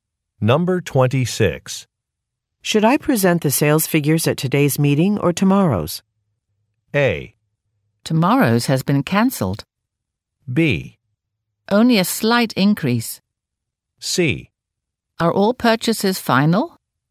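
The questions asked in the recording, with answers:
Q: Should I present the sales figures at today's meeting or tomorrow's?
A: A: Tomorrow's has been cancelled.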